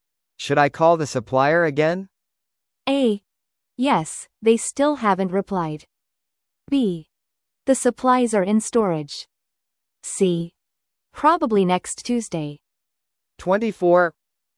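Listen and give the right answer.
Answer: A: Yes, they still haven't replied.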